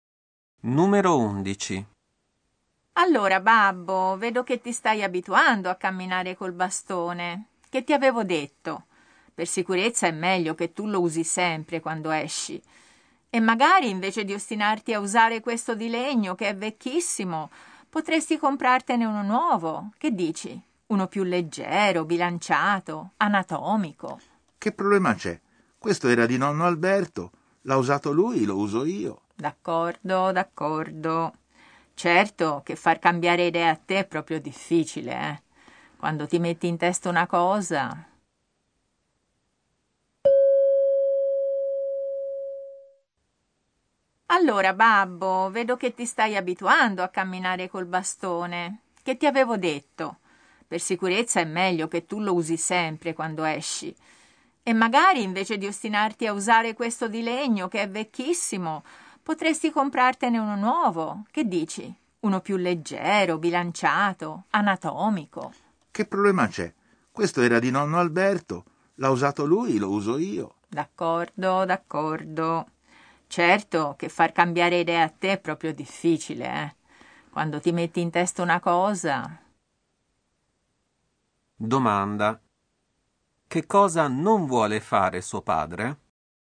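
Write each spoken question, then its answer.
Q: Domanda. Che cosa non vuole fare suo padre?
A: Comprare un bastone nuovo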